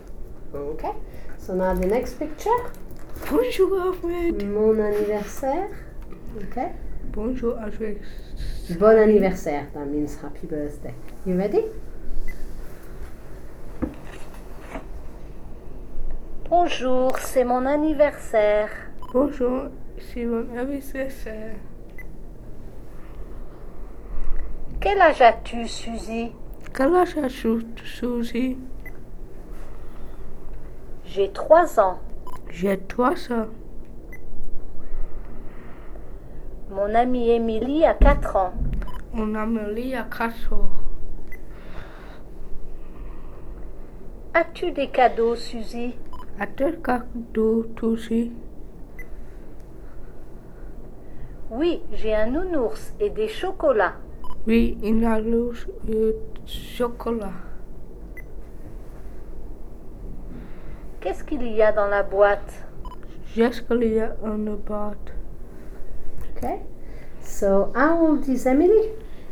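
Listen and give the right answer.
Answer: 4 ans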